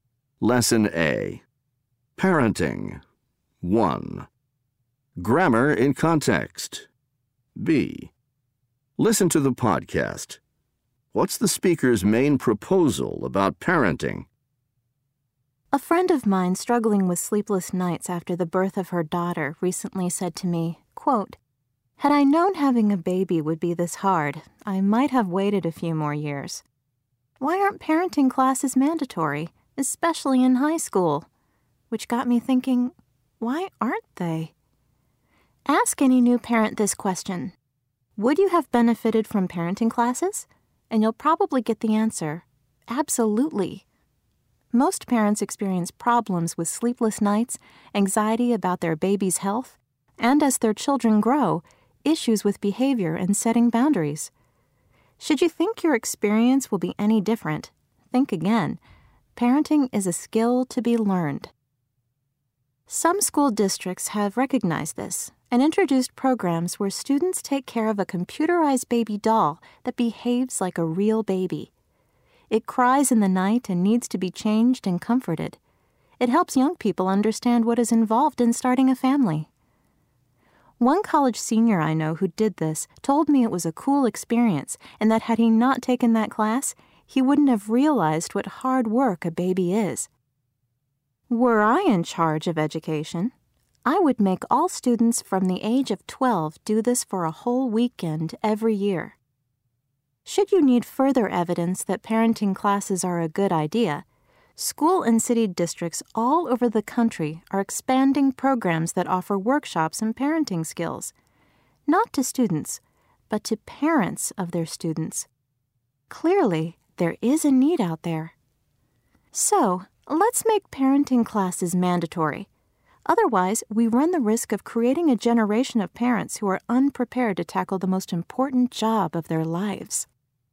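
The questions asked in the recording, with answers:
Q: What's the speaker's main proposal about parenting?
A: Parenting classes should be mandatory, especially in high school.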